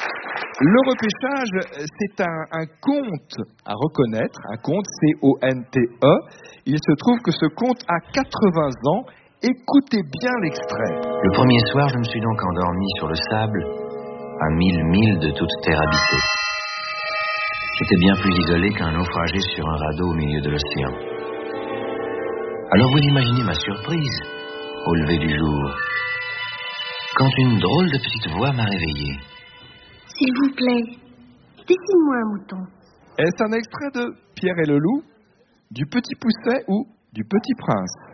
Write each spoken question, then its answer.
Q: Est-ce un extrait de Pierre et le Loup, du Petit Poucet ou du Petit Prince ?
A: c'est un extrait du Petit Prince de Saint-Exupéry